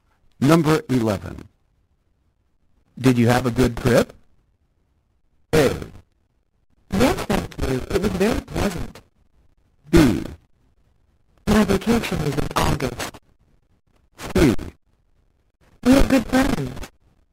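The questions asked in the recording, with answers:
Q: Did you have a good trip?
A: A: Yes, thank you. It was very pleasant.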